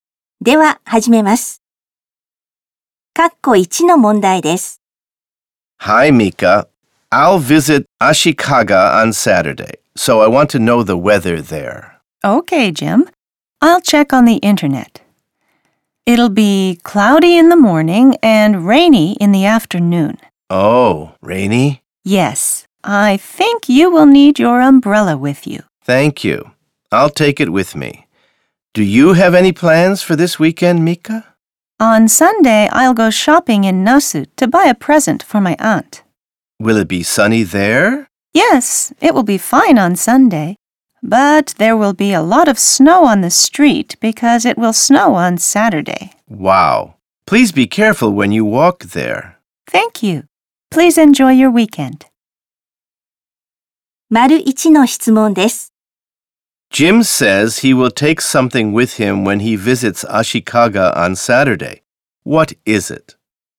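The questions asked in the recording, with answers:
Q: Jim says he will take something with him when he visits Ashikaga on Saturday. What is it?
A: An umbrella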